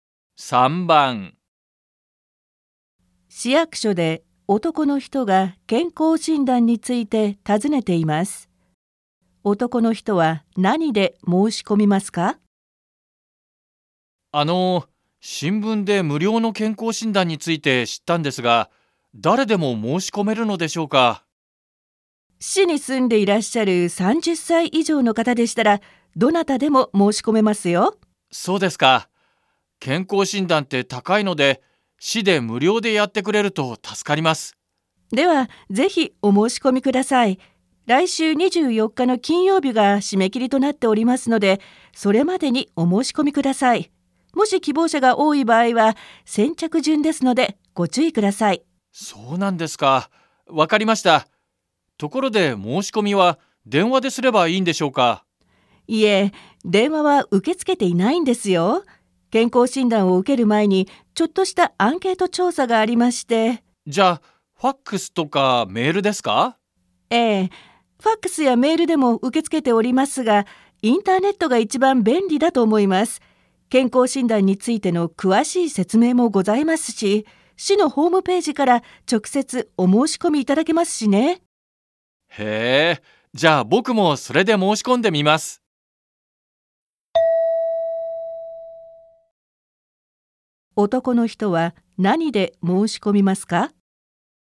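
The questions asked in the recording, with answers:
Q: 男の人は何で申し込みますか?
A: インターネット(市のホームページ)

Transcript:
市役所で男の人が健康診断について訊ねています。男の人は何で申し込みますか。
M:あの、新聞で無料の健康診断について知ったんですが、誰でも申し込めるのでしょうか。
F:市に住んでいらっしゃる
30才以上の方でしたら、どなたでも申し込めますよ。
M:そうですか。健康診断って高いので、市で無料でやってくれると助かります。
F:では、ぜひお申し込みください。来週24日の金曜日が締め切りとなっておりますので、それまでにお申し込みください。もし希望者が多い場合は先着順ですので、ご注意ください。
M:そうなんですか。わかりました。ところで、申し込みは電話ですればいいんでしょうか。
F:いえ、電話は受け付けていないんですよ。健康診断を受ける前にちょっとしたアンケート調査がありまして/ Không, không tiếp nhận đăng ký qua điện thoại ạ.
M:じゃ、ファックスやメールですか。 /Vậy thì qua fax hay qua mail à?
F:ええ、ファックスやメールでも受け付けておりますが、インターネットが一番便利だと思います。健康診断についての詳しい説明もございますし、市のホームページから直接お申し込みいただけますしね。
M:へえ、じゃ、僕もそれで申し込んでみます。Vậy, tôi cũng đăng ký qua đấy thử xem.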